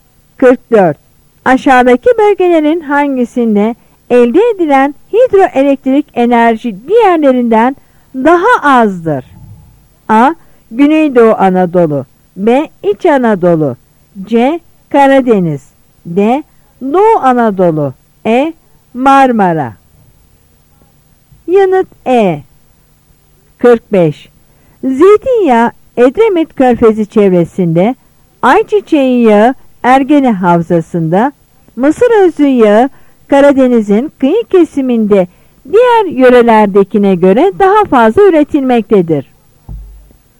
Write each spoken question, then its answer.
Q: Aşağıdaki bölgelerin hangisinde elde edilen hidroelektrik enerji diğerlerinden daha azdır?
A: Yanıt E.